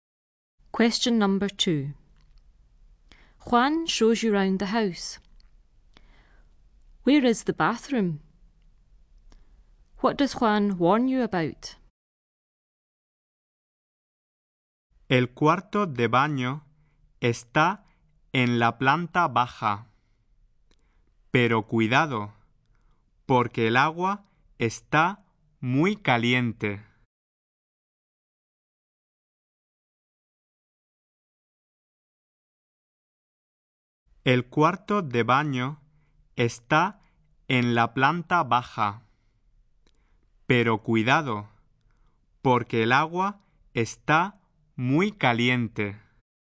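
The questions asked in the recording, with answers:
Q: Where is the bathroom?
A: On the ground floor

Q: What does Juan warn you about?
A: The water is very hot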